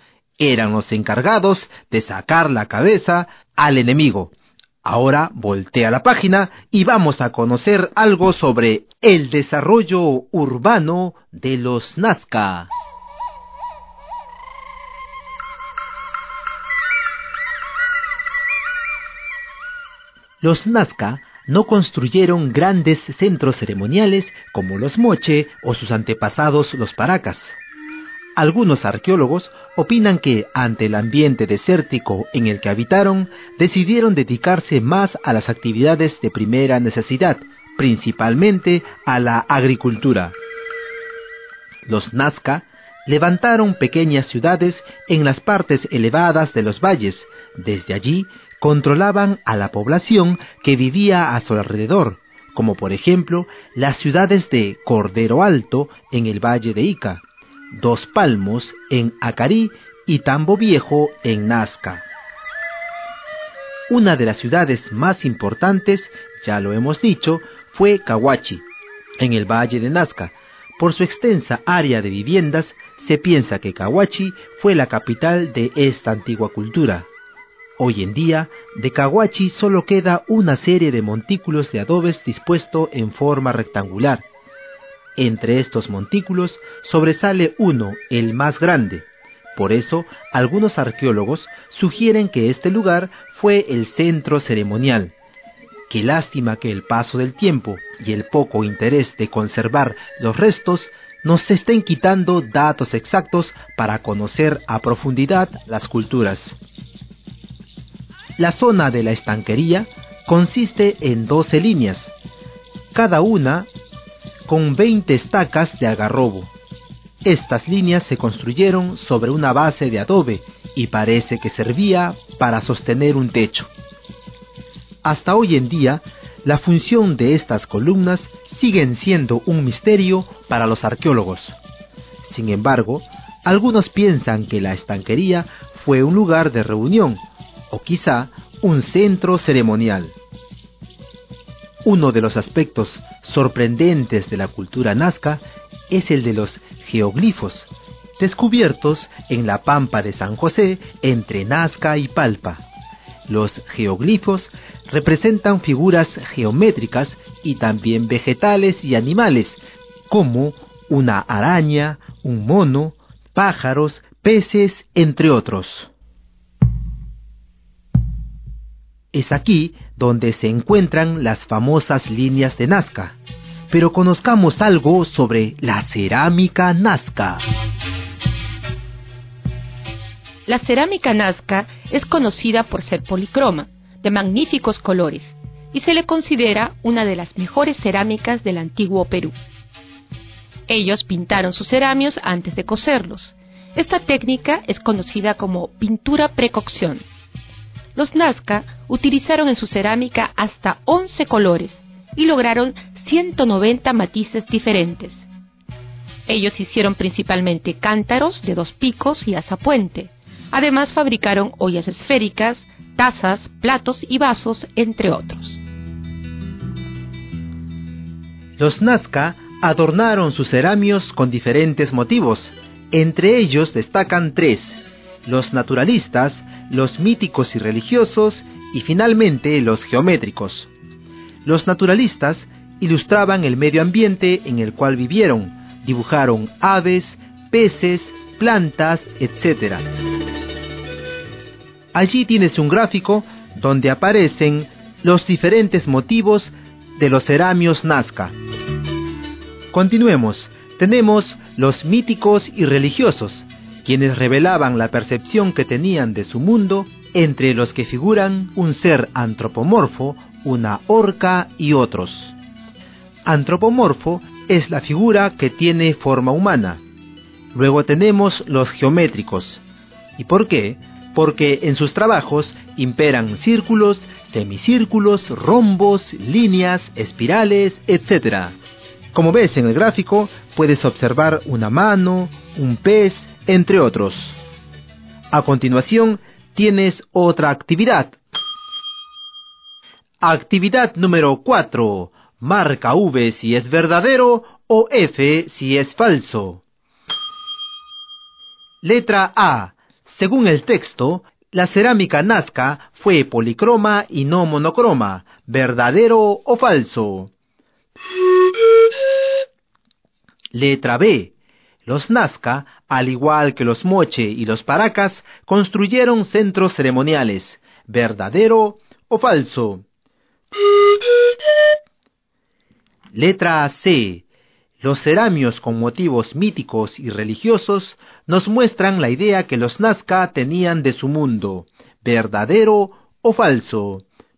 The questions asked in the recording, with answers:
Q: Según el texto, la cerámica nazca fue policroma y no monocroma.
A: Por lo tanto, esta alternativa es verdadera.

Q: Los Nazca, al igual que los Moche y los Paracas, construyeron centros ceremoniales. ¿Verdadero o falso?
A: Esta alternativa es falsa.

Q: Los ceramios con motivos míticos y religiosos nos muestran la idea que los Nazca tenían de su mundo, verdadero o falso.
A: Esta alternativa es verdadera.